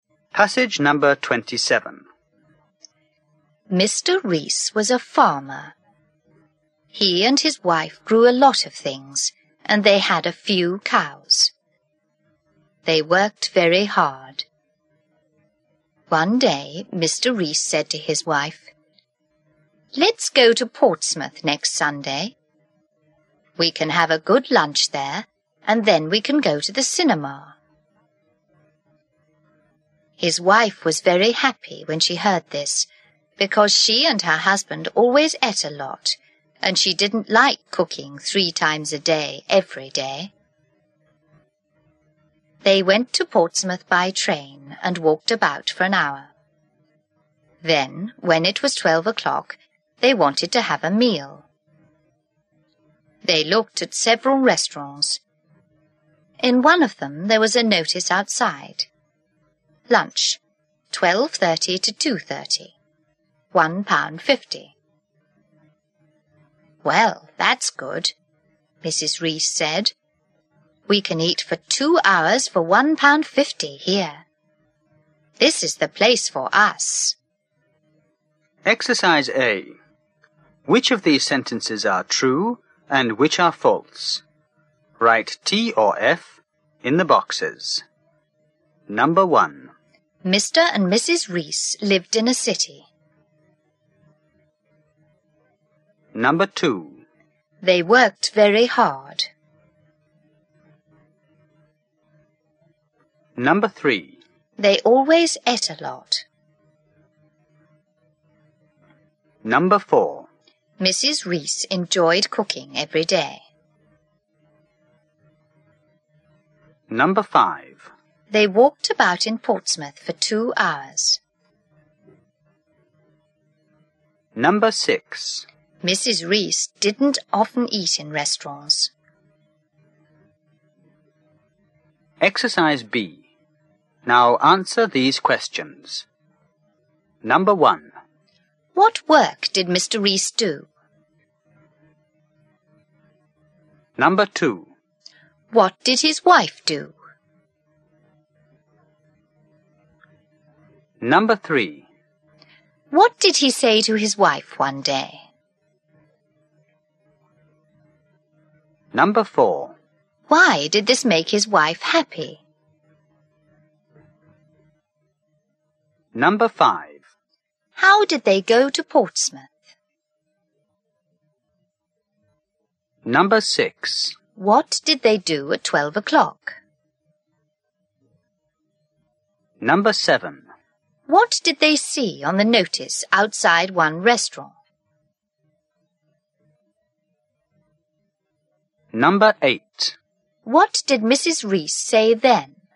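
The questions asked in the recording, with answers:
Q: Mr. and Mrs. Rees lived in a city.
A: False

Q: They worked very hard.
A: True

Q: They always ate a lot.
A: True

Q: Mrs. Rees enjoyed cooking every day.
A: False

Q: They walked about in Portsmouth for 2 hours.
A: False

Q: What work did Mr. Rees do?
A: He was a farmer.

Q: What did he say to his wife one day?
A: Let's go to Portsmouth next Sunday for a good lunch and then the cinema.

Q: Why did this make his wife happy?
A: Because she didn't like cooking 3 times a day, every day.

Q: How did they go to Portsmouth?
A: By train.

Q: What did they do at 12 o'clock?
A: They wanted a meal and looked at several restaurants.

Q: What did they see on the notice outside one restaurant?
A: Lunch, 12:30 to 2:30, £1.50.

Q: What did Mrs. Rees say then?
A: We can eat for 2 hours for £1.50 here; this is the place for us.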